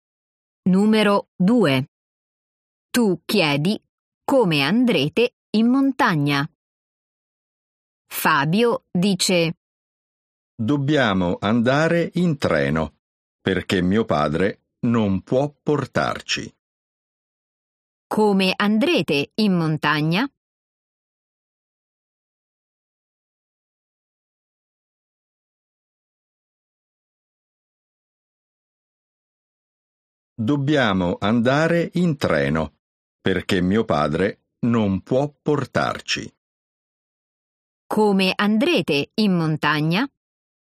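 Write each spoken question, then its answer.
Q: Come andrete in montagna?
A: In treno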